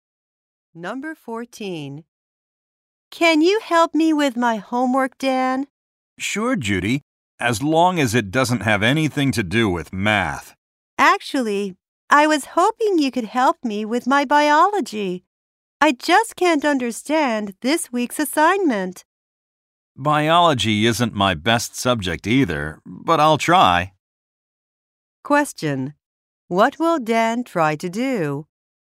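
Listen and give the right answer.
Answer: Help Judy with her biology homework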